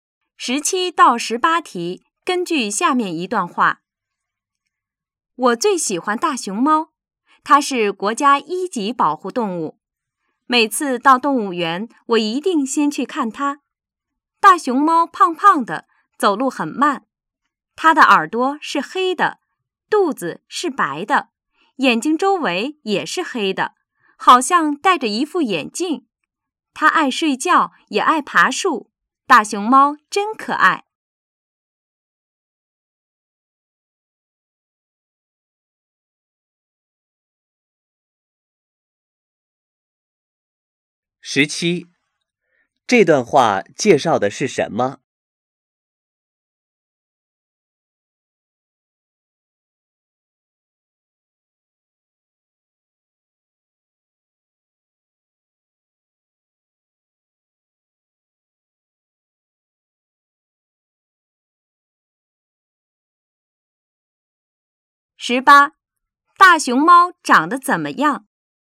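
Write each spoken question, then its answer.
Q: 这段话介绍的是什么?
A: 大熊猫

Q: 大熊猫长得怎么样?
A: 胖胖的,耳朵是黑的,肚子是白的,眼睛周围是黑的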